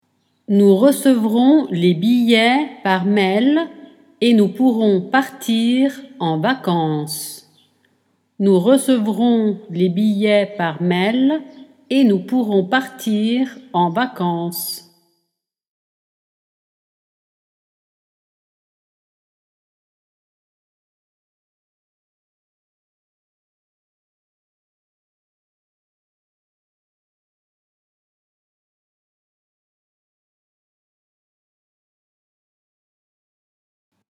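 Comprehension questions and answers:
Nous et .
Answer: recevrons les billets par mail / nous pourrons partir en vacances

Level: Dettato di francese A2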